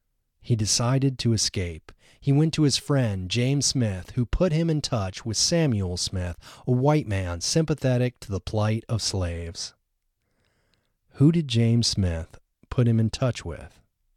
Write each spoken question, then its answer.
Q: Who did James Smith put him in touch with?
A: James Smith put him in touch with Samuel Smith.